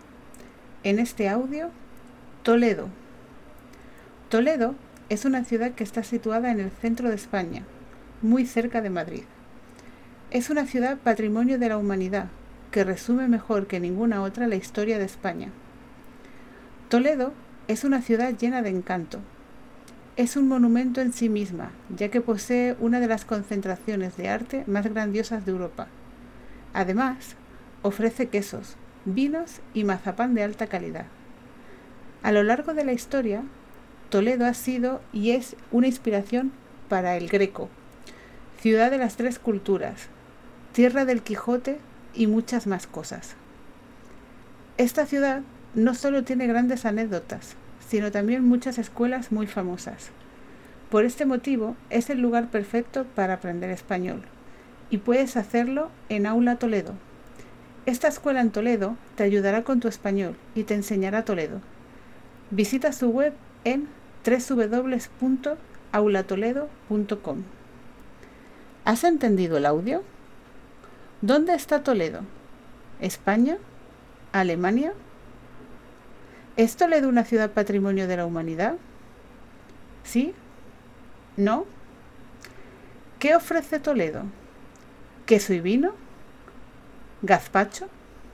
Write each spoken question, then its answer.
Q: ¿Dónde está Toledo?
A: La respuesta correcta es España.

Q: ¿Esto le da una ciudad patrimonio de la humanidad?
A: Sí

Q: ¿Qué ofrece Toledo?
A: queso y vino.